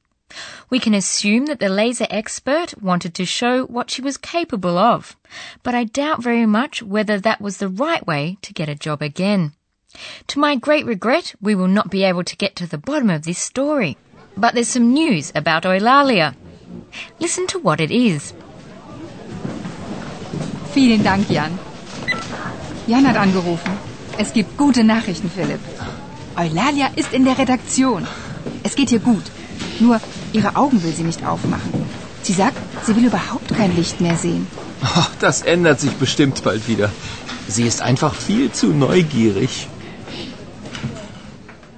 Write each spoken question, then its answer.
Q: Listen to what it is.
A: So, Eulalia doesn't want to open her eyes anymore, so she's not blinded by the light.